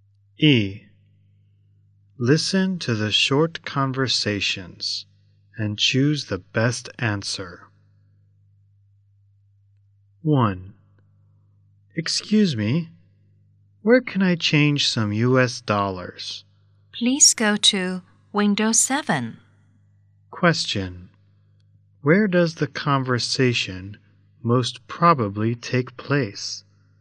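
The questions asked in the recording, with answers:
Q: Where does the conversation most probably take place?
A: At a bank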